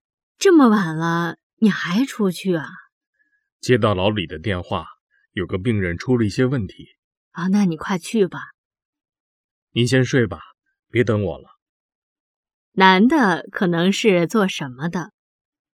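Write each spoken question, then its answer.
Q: 男的可能是做什么的?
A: 医生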